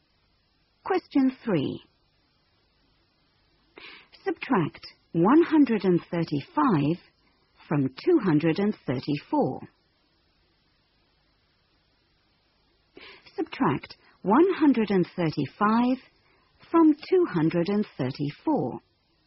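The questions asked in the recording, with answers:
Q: Subtract 135 from 234.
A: 99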